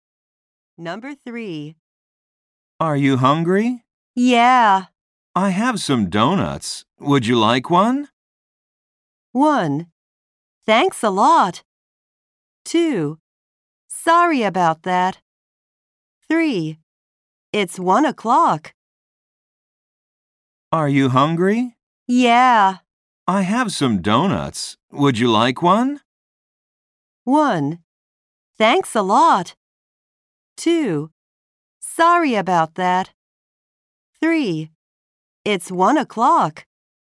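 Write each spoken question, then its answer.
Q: I have some donuts. Would you like one?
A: 1: Thanks a lot.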